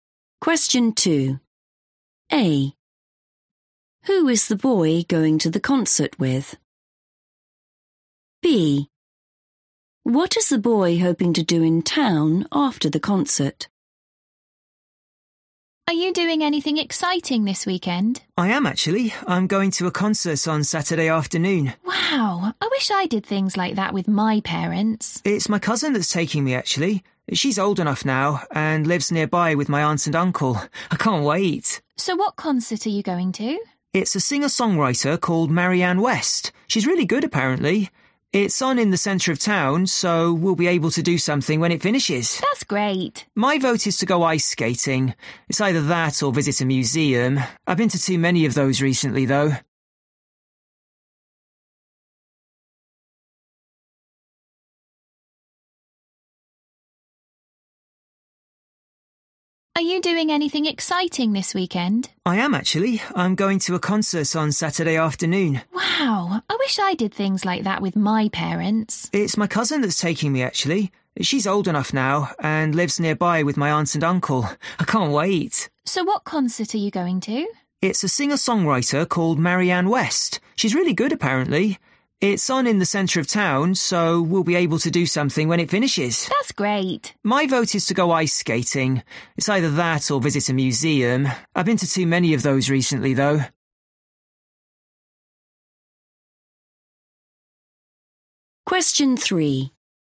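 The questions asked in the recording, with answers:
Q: Who is the boy going to the concert with?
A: his cousin

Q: What is the boy hoping to do in town after the concert?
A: go ice skating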